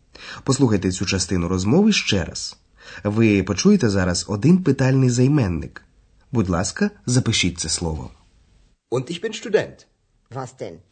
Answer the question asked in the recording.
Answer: Це займенник вас.